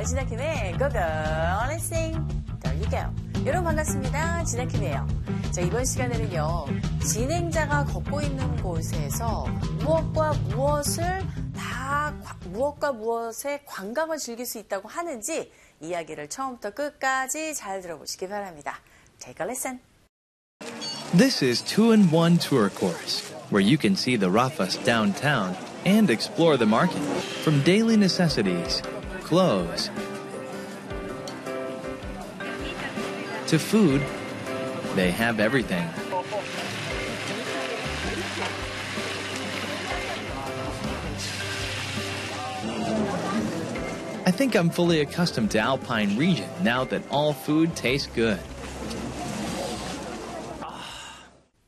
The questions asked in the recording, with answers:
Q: 진행자가 걷고 있는 곳에서 무엇과 무엇의 관광을 즐길 수 있다고 하는지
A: 네, 라파스의 도심과 시장을 둘러볼 수 있는 그런 관광 코스라고 하죠.